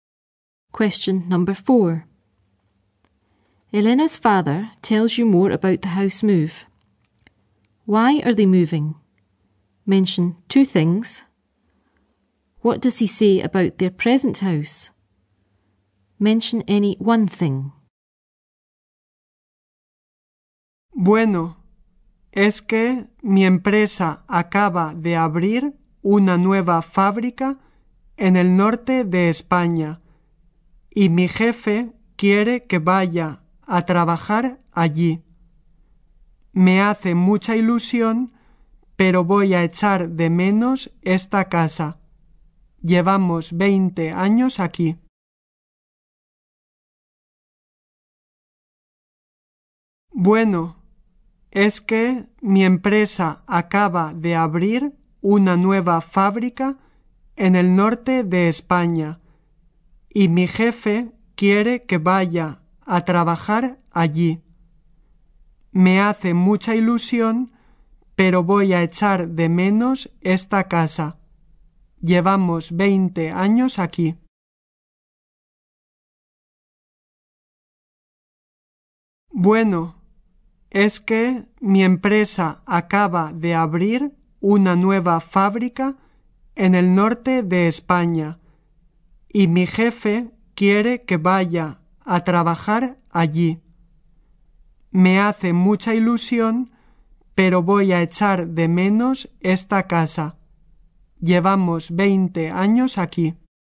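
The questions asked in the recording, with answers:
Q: Why are they moving? Mention two things.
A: His company has just opened a new factory in the north of Spain and his boss wants him to work there

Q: What does he say about their present house?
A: He will miss it; they have lived there 20 years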